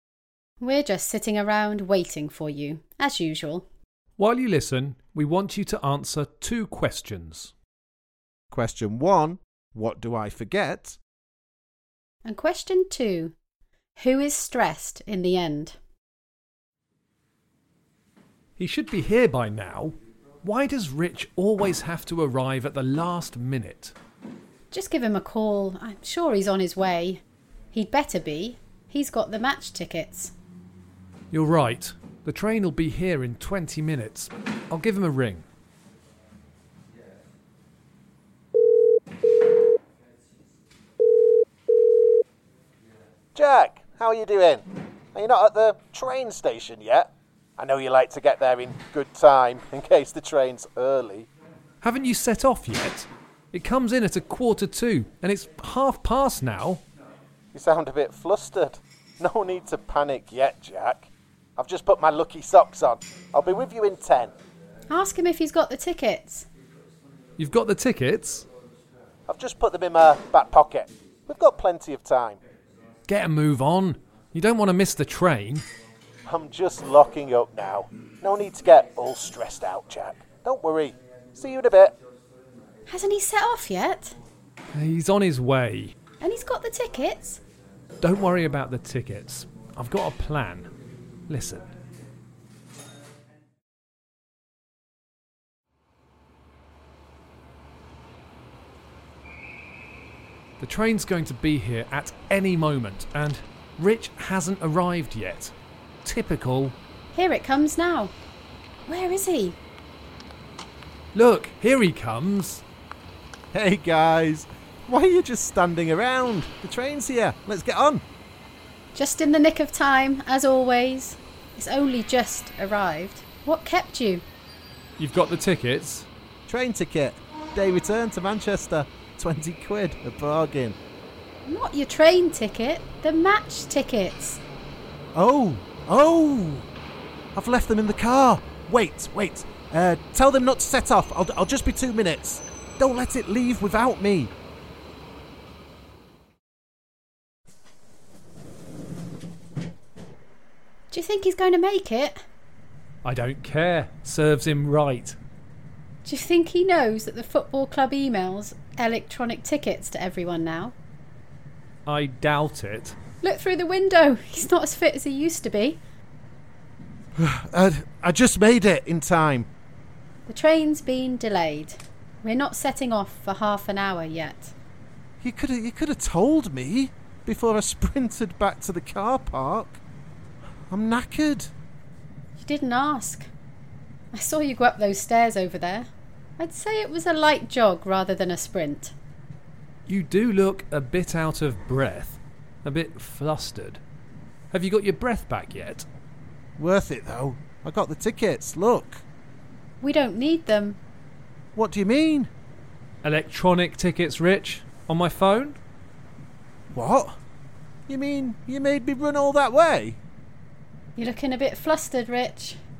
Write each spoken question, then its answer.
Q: Question one, what do I forget?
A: Rich forgot the match tickets.

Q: And question two, who is stressed in the end?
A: Yes, it was Rich.